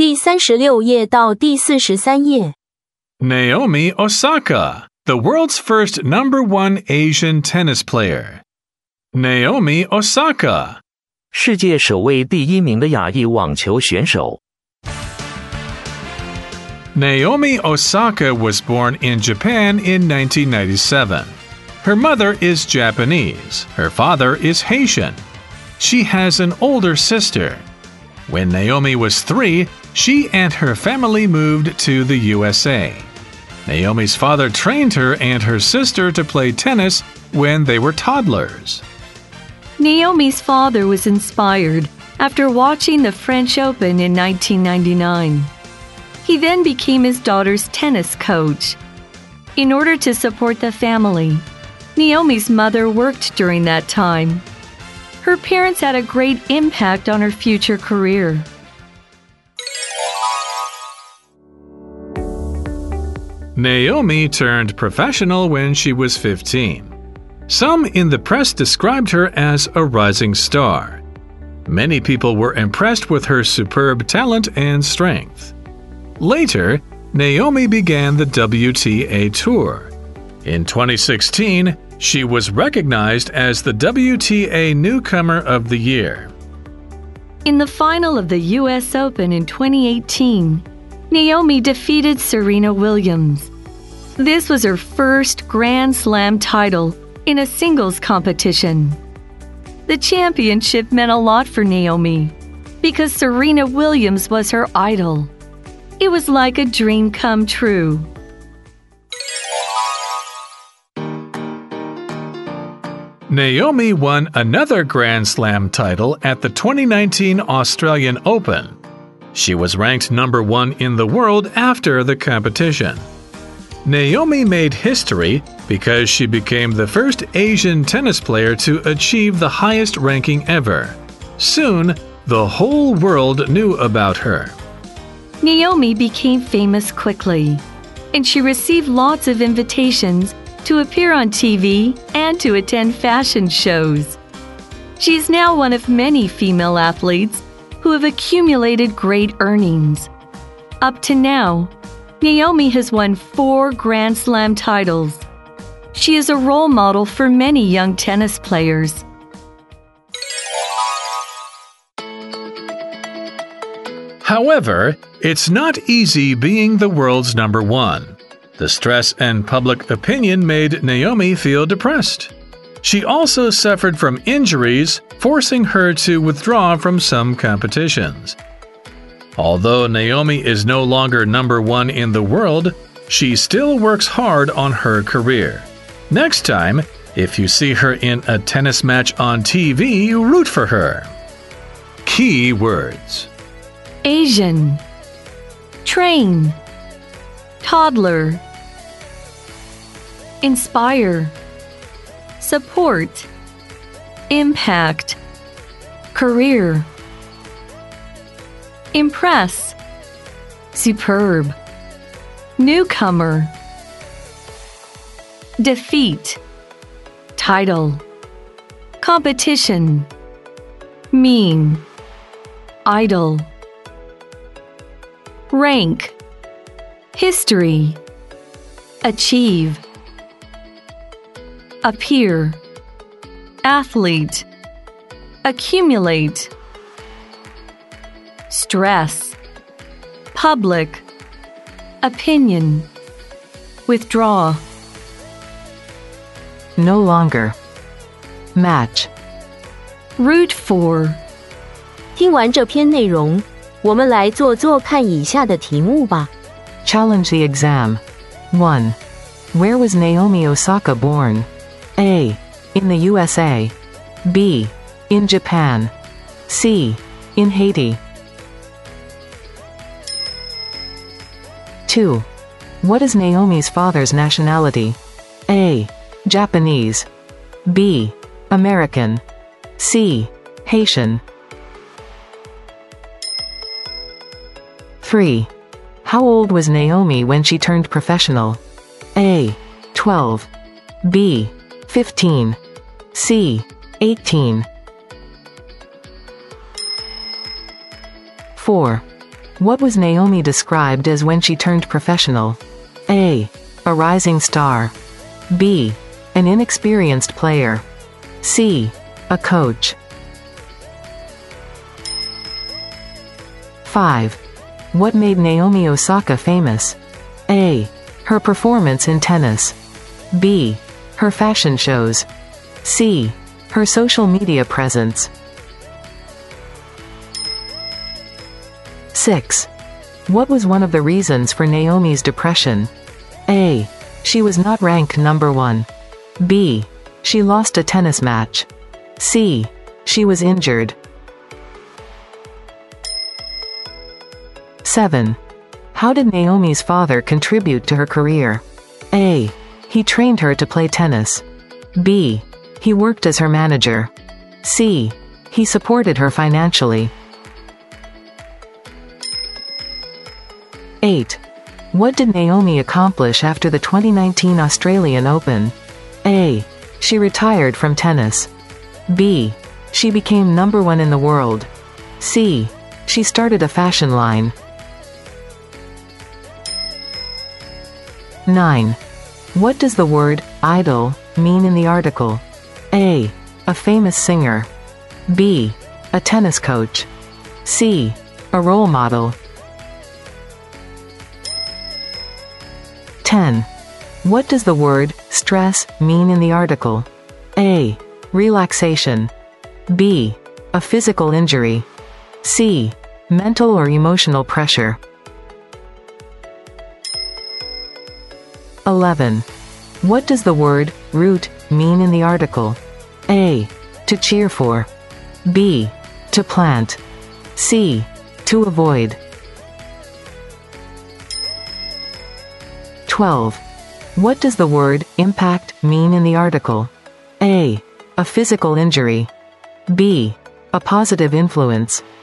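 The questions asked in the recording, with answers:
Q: Where was Naomi Osaka born?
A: B: In Japan

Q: What is Naomi's father's nationality?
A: C: Haitian

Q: How old was Naomi when she turned professional?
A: B: 15

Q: What was Naomi described as when she turned professional?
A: A: A rising star

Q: What made Naomi Osaka famous?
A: A: Her performance in tennis

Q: How did Naomi's father contribute to her career?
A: A: He trained her to play tennis

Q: What did Naomi accomplish after the 2019 Australian Open?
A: B: She became number one in the world

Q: What does the word idol mean in the article?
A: C: A role model

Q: What does the word stress mean in the article?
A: C: Mental or emotional pressure

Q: What does the word root mean in the article?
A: A: To cheer for

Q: What does the word impact mean in the article?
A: B: A positive influence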